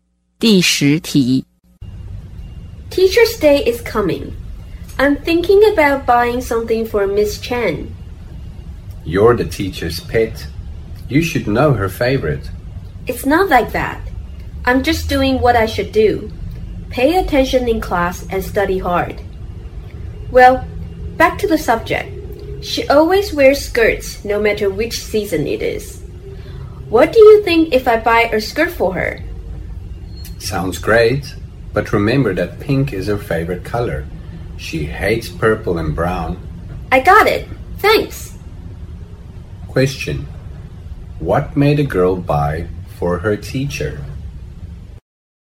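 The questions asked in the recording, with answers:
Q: what made a girl buy for her teacher?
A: A pink skirt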